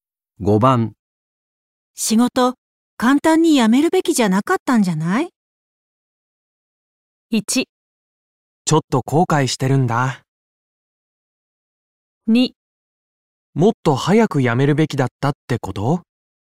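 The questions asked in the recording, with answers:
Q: 仕事、簡単に辞めるべきじゃなかったんじゃない?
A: 1: ちょっと後悔してるんだ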